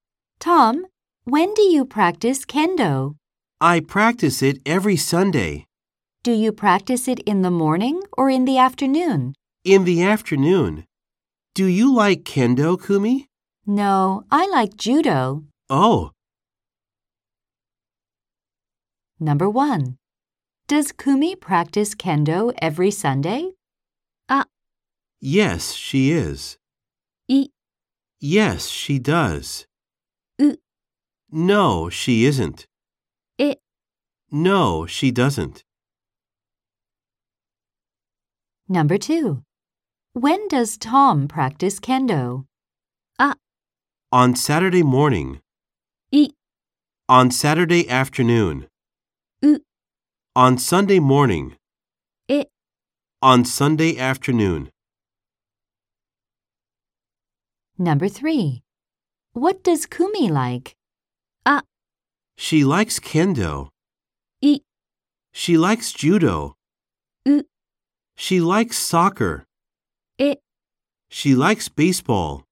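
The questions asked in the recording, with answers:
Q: Does Kumi practice kendo every Sunday?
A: エ: No, she doesn't.

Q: When does Tom practice kendo?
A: エ: On Sunday afternoon.

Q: What does Kumi like?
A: イ: She likes judo.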